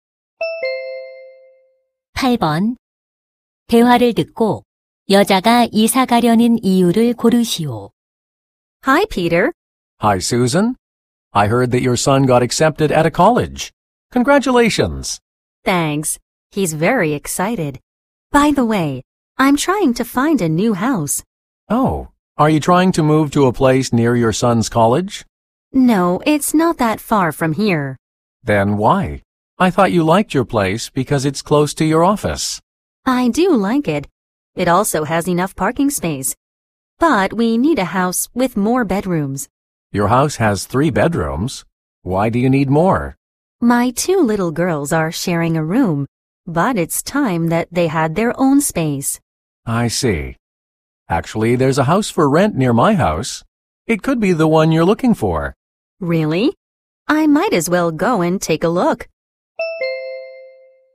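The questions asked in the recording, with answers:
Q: 대화를 듣고 여자가 이사 가려는 이유를 고르시오.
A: 딸들에게 각자의 방이 필요해서 (침실이 더 많은 집이 필요해서)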